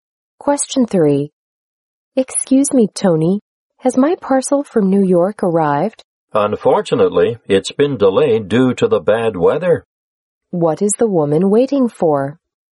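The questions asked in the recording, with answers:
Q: What is the woman waiting for?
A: A parcel from New York.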